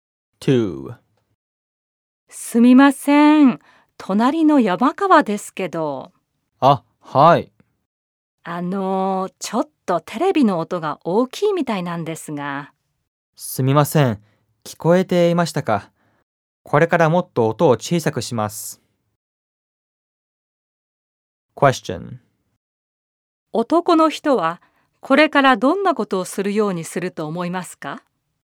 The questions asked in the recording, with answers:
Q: 男の人はこれからどんなことをするようにすると思いますか?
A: 男の人はこれからテレビの音を小さくするようにすると思います。